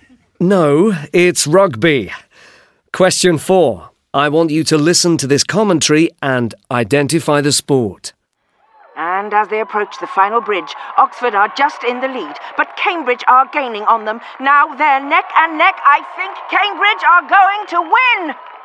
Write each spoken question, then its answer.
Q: I want you to listen to this commentary and identify the sport.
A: Rowing.